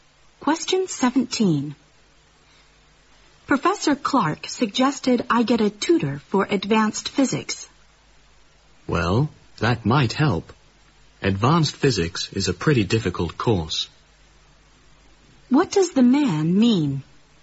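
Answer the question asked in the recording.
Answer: A tutor might help, because advanced physics is a difficult course.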